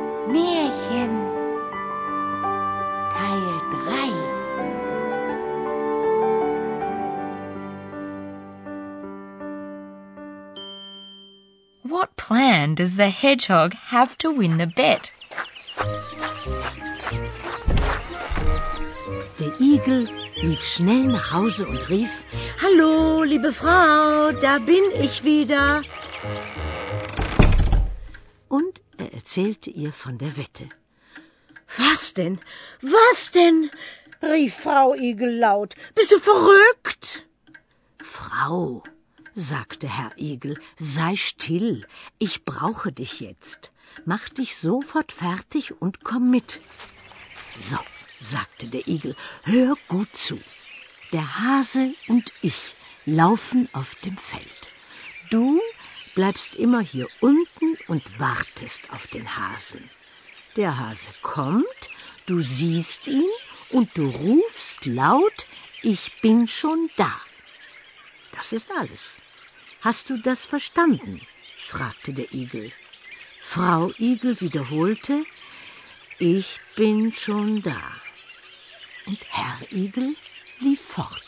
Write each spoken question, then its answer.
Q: What plan does the hedgehog have to win the bet?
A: The hedgehog's plan was to get his wife involved in the action.